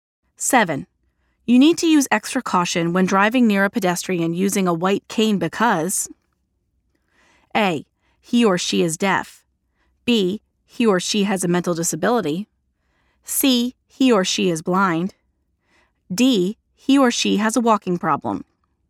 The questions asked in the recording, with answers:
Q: You need to use extra caution when driving near a pedestrian using a white cane because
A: The answer is letter C. A white cane indicates a vision impairment.